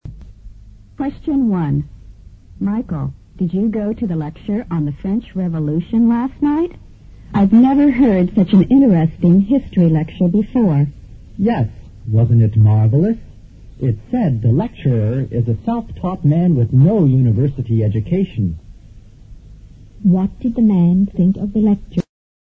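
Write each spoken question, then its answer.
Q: What did the man think of the lecture?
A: It was very interesting (marvelous).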